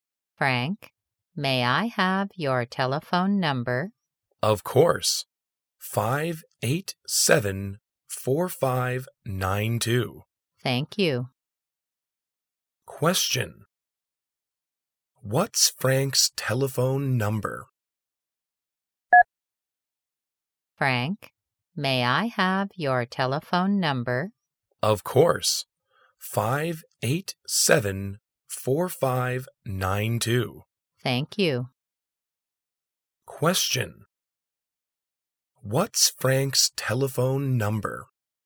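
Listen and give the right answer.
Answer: 587-4592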